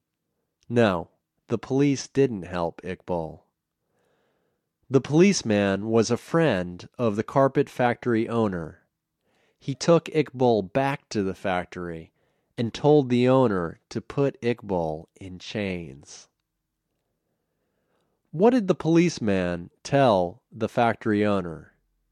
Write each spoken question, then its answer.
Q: What did the policeman tell the factory owner?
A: He told the factory owner to put Iqbal in chains.